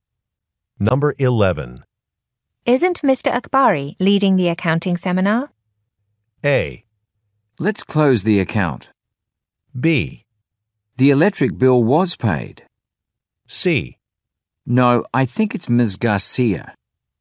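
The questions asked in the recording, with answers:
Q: Isn't Mr. Akbari leading the accounting seminar?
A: C: No, I think it's Ms. Garcia.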